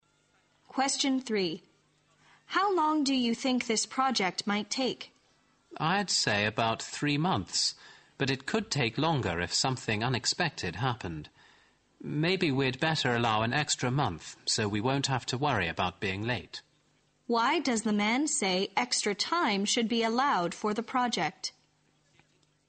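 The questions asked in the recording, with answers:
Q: Why does the man say extra time should be allowed for the project?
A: So they won't have to worry about being late if something unexpected happens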